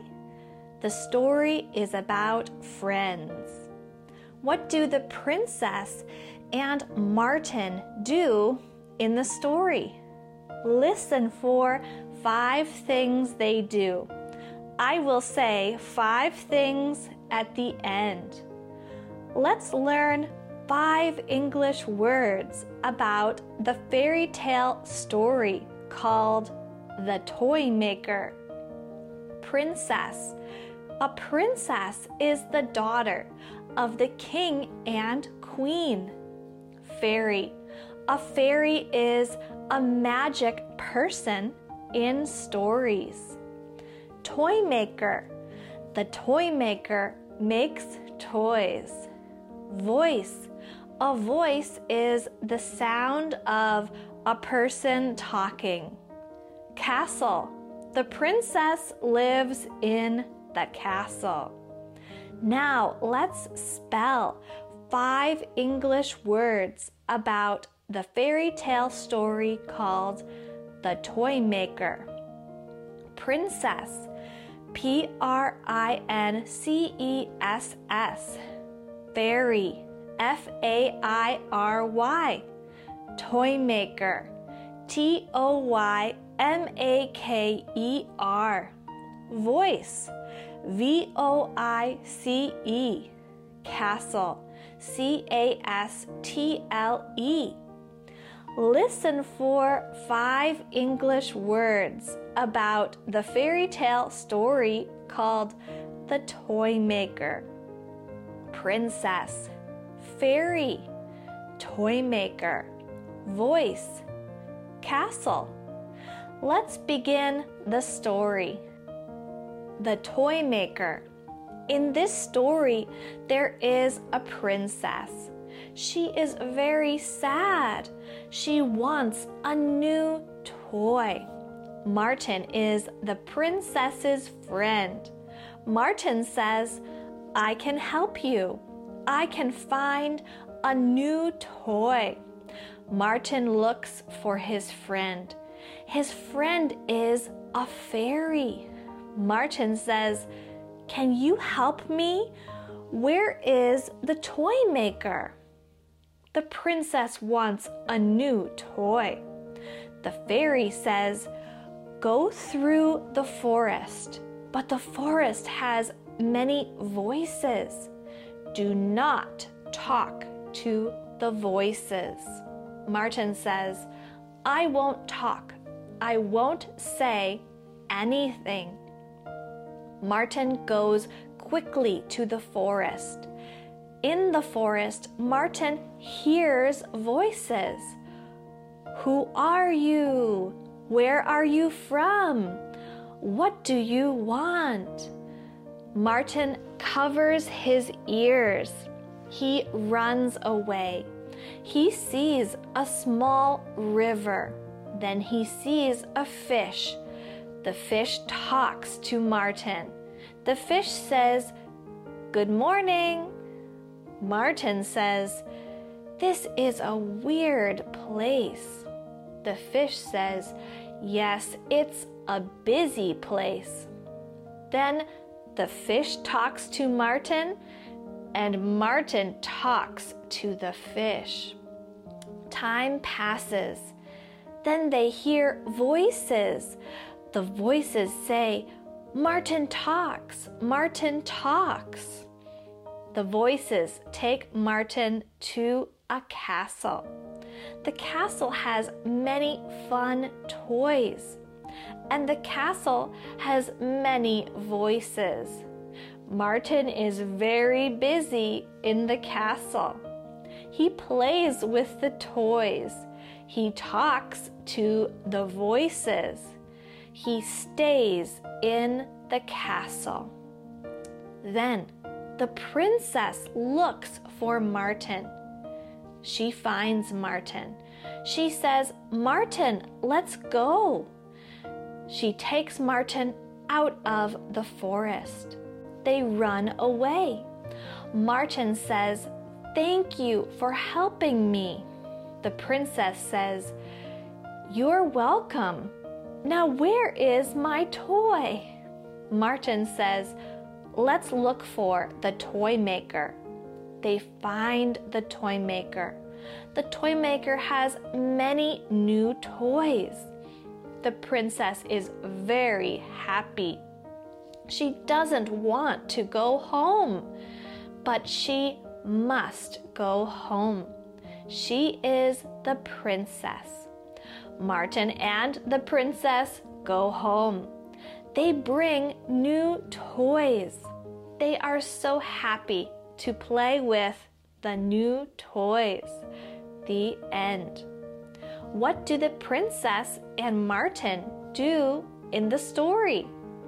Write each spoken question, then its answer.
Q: What do the princess and Martin do in the story?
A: 1. The princess asks for a new toy. 2. Martin goes to find a new toy. 3. Martin talks to the fish. 4. The princess helps Martin go out of the forest. 5. Martin and the princess find the new toys.